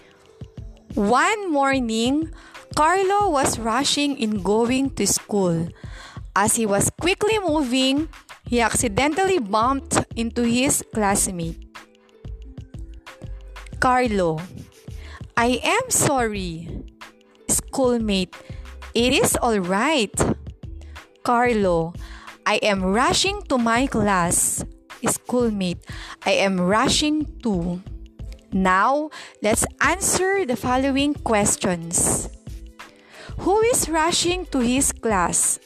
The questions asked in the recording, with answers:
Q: Who is rushing to his class?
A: Very good! It's Carlo.